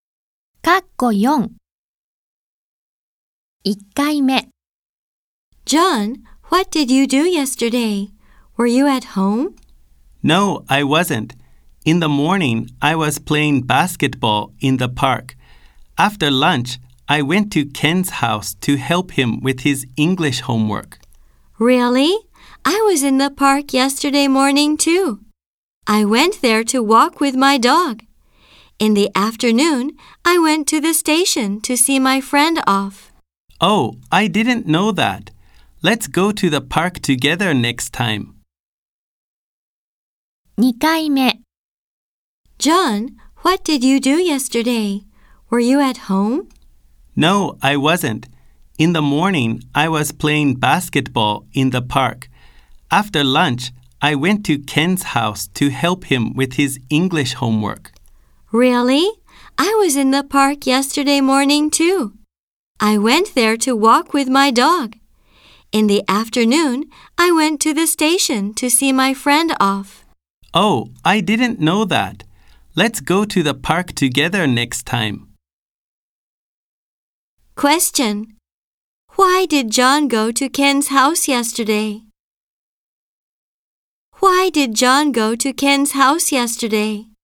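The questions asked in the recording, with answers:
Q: Why did John go to Ken's house yesterday?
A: To help him with his English homework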